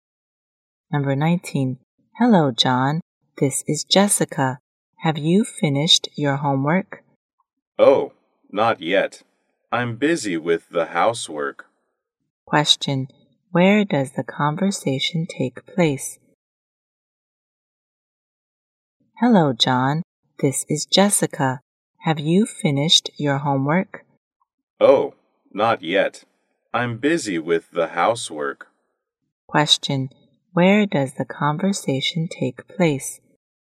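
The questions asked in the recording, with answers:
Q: Where does the conversation take place?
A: On the phone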